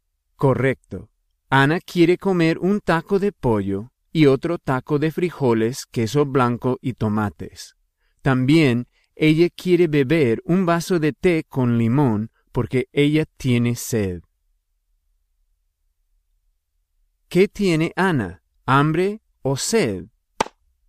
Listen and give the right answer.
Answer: Ana tiene hambre y también tiene sed.